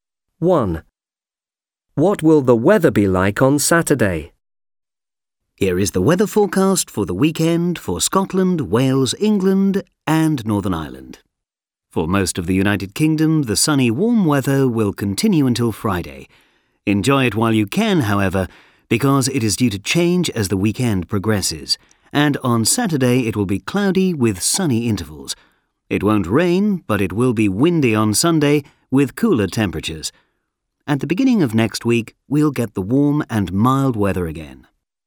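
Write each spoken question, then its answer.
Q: What will the weather be like on Saturday?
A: cloudy with sunny intervals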